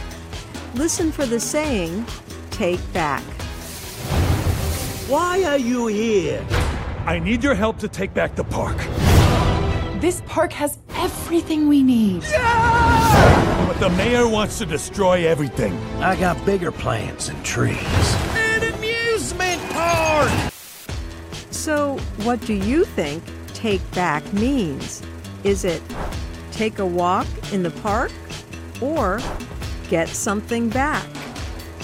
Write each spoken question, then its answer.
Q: So, what do you think take back means?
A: Take back means to get something back.